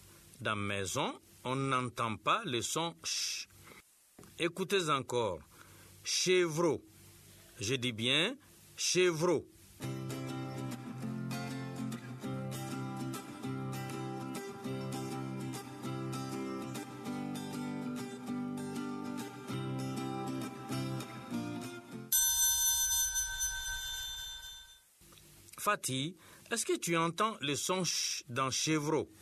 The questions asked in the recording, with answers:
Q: Fatih, est-ce que tu entends le son ch dans chevreau?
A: Oui, monsieur. Dans chevreau, il y a le son ch.